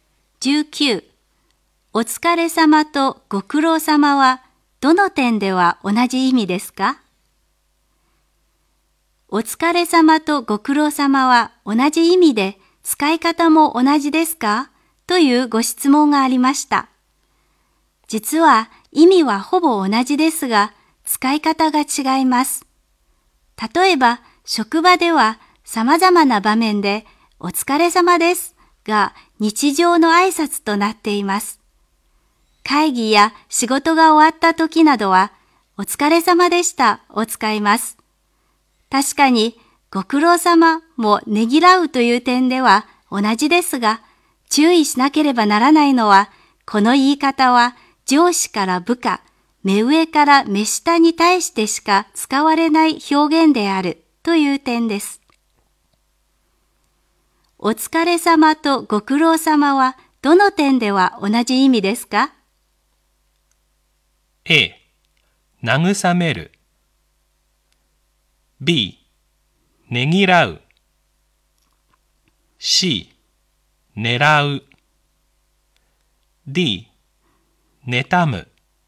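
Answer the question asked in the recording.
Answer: B: ねぎらう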